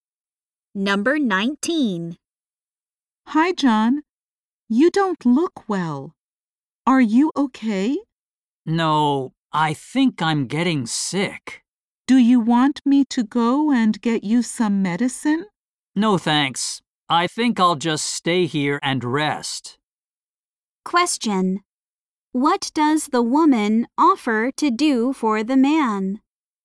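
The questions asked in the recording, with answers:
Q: What does the woman offer to do for the man?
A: Go and get him some medicine.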